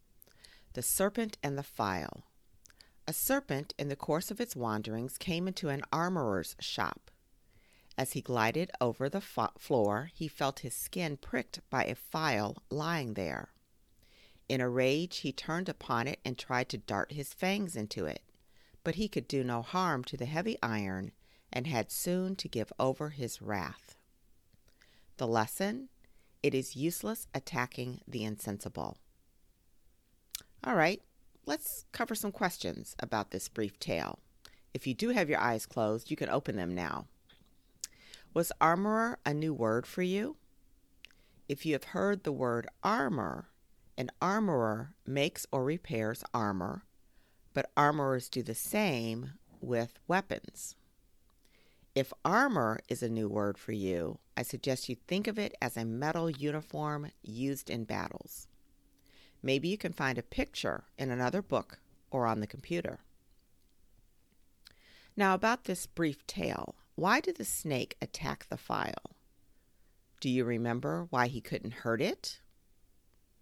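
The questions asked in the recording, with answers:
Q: Now about this brief tale, why did the snake attack the file?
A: Because the file pricked its skin as it glided over the floor.

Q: Do you remember why he couldn't hurt it?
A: Because the file was made of heavy iron.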